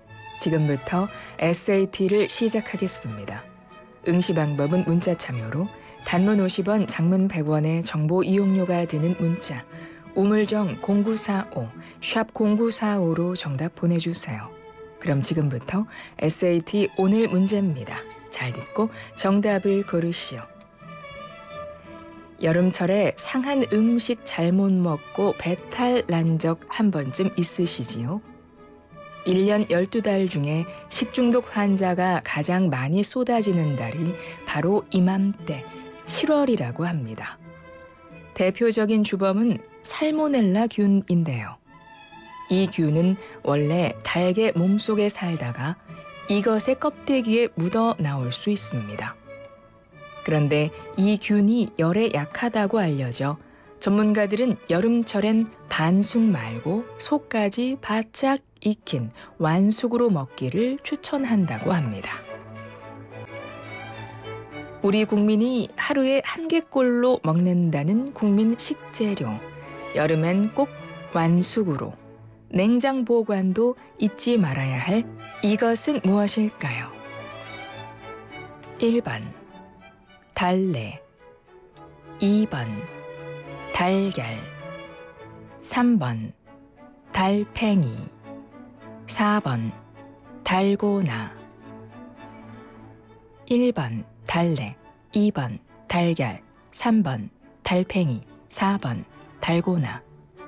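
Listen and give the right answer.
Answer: 2번: 달걀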